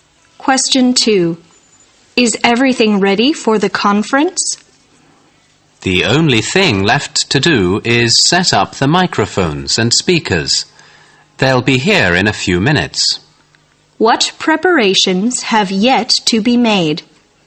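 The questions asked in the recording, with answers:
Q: What preparations have yet to be made?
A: Setting up the microphones and speakers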